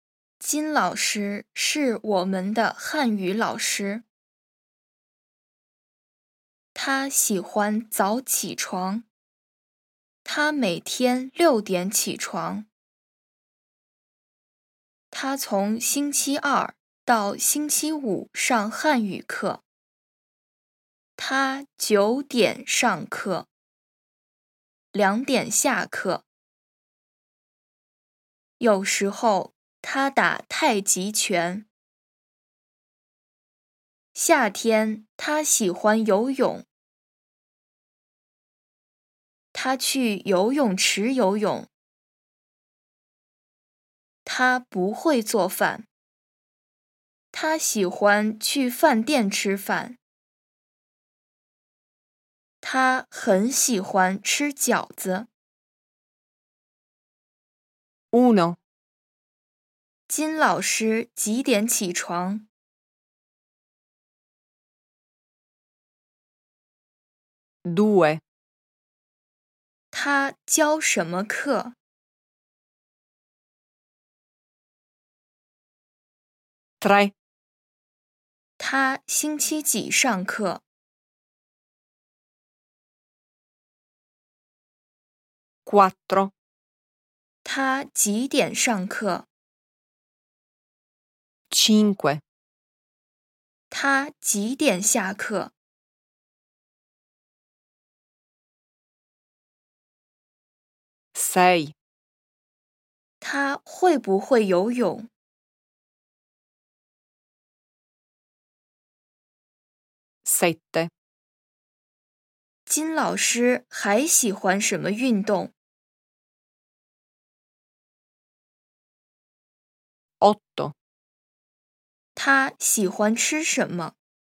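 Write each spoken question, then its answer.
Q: 金老师几点起床?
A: 6点

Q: 他教什么课?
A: 汉语课

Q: 他星期几上课?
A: 星期二到星期五

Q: 他几点上课?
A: 9点

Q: 他几点下课?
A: 2点

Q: 金老师还喜欢什么运动?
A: 太极拳

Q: 他喜欢吃什么?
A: 饺子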